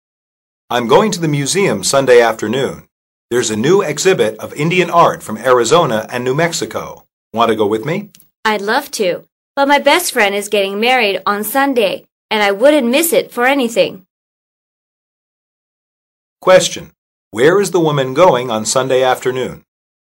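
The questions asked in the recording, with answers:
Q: Where is the woman going on Sunday afternoon?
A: To her best friend's wedding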